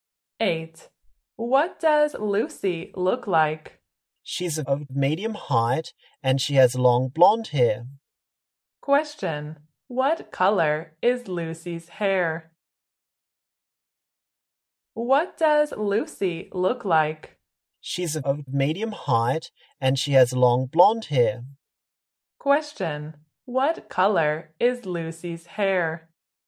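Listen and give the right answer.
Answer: Blonde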